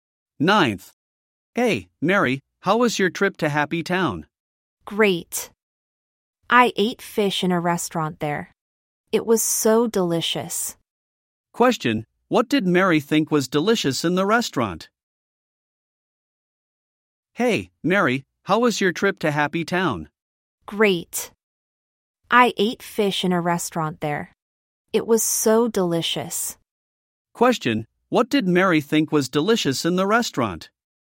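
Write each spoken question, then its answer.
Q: Question, what did Mary think was delicious in the restaurant?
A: The fish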